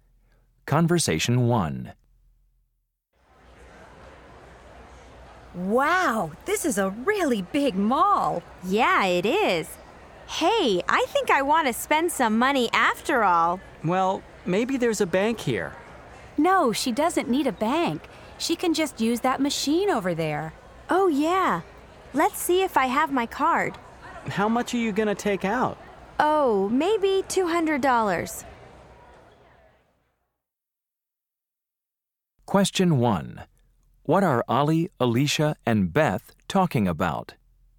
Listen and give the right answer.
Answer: No, it's an automated teller, right?